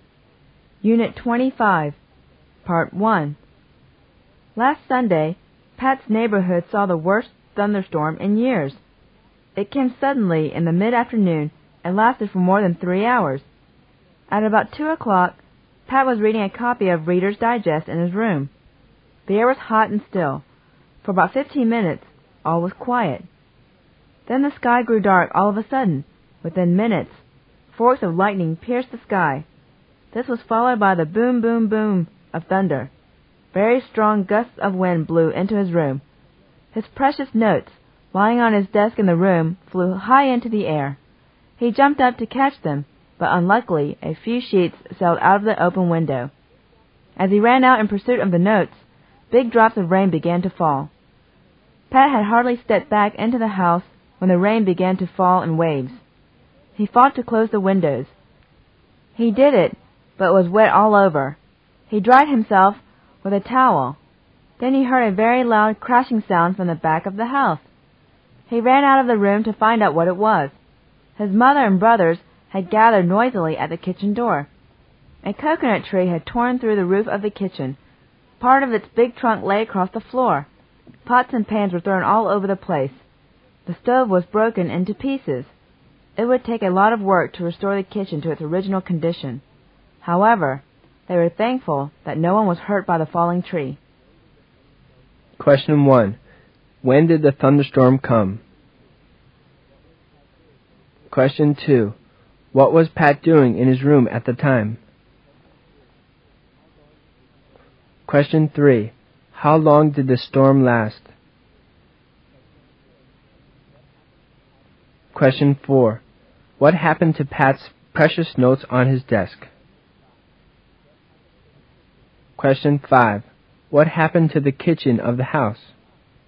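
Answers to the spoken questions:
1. Last Sunday, in the mid-afternoon
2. Reading a copy of Reader's Digest
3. More than 3 hours
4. They flew into the air and a few sheets blew out of the window
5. A coconut tree tore through its roof and wrecked it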